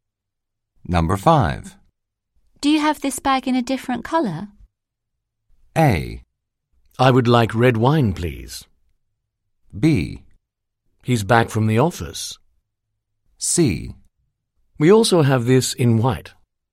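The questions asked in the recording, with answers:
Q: Do you have this bag in a different color?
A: C: We also have this in white.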